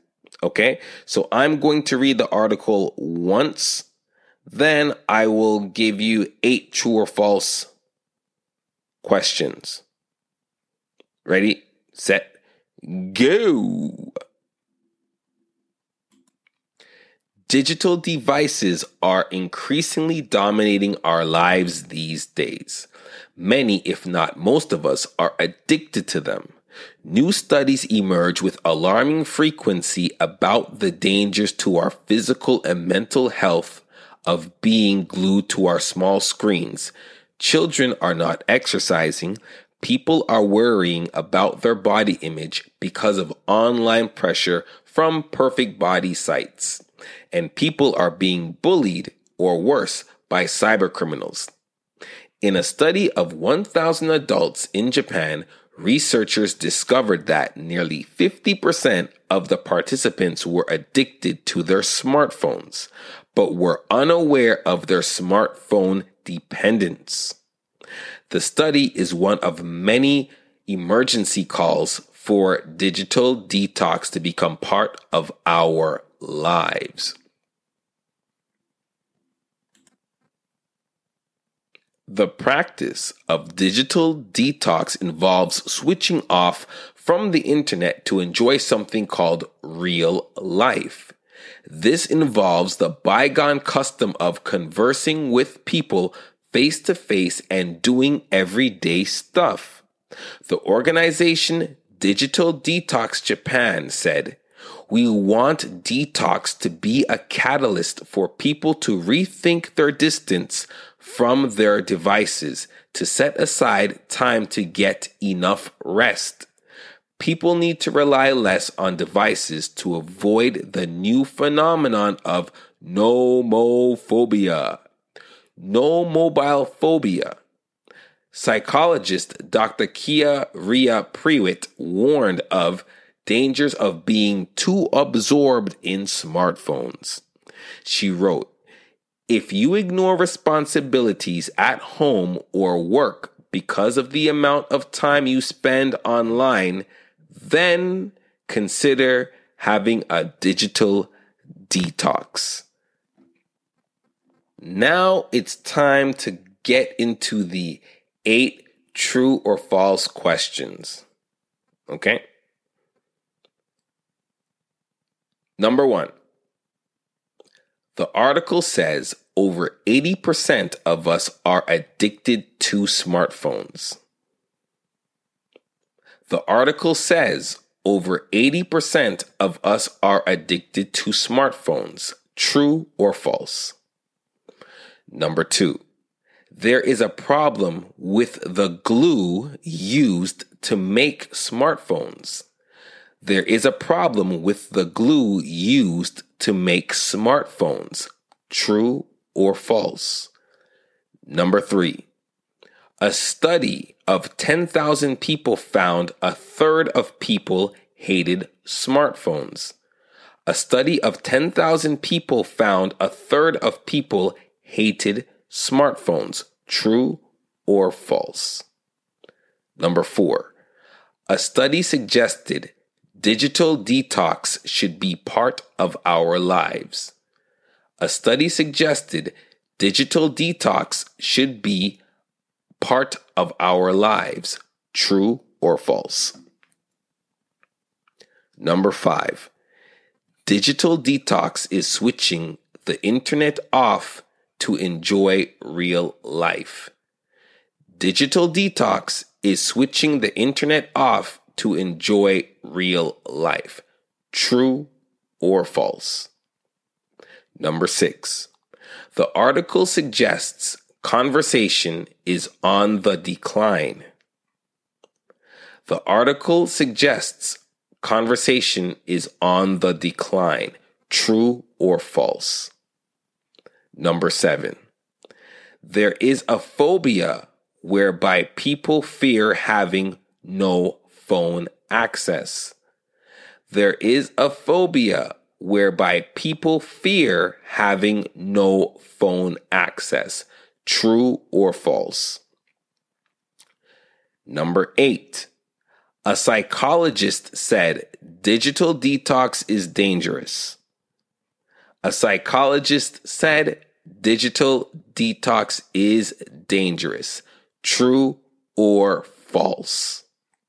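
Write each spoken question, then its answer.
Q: The article says over 80% of us are addicted to smartphones.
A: False

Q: There is a problem with the glue used to make smartphones.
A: False

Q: A study of 10,000 people found a third of people hated smartphones.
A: False

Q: A study suggested digital detox should be part of our lives.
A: True

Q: Digital detox is switching the internet off to enjoy real life.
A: True

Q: There is a phobia whereby people fear having no phone access.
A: True

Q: A psychologist said digital detox is dangerous.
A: False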